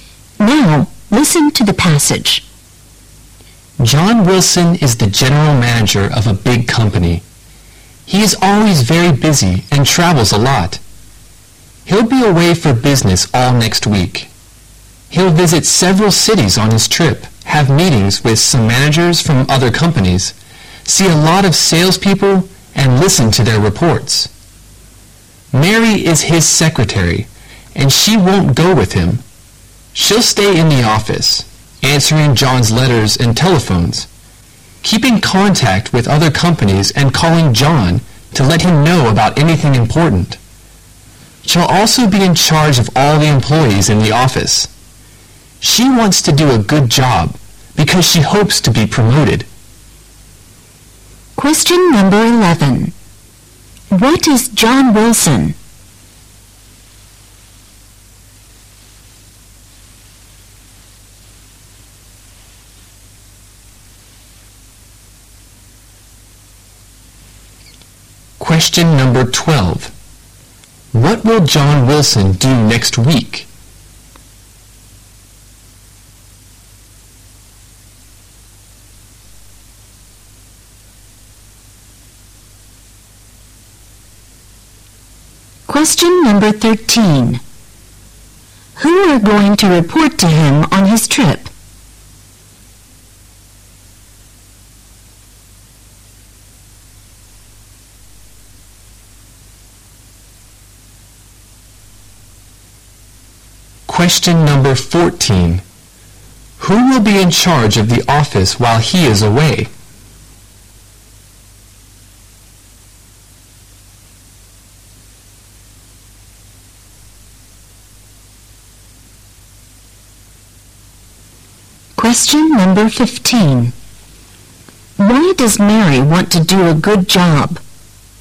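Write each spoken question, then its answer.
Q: What is John Wilson?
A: General manager

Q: What will John Wilson do next week?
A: Travel on business

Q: Who are going to report to him on his trip?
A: Salespeople

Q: Who will be in charge of the office while he is away?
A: Mary, his secretary

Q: Why does Mary want to do a good job?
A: To be promoted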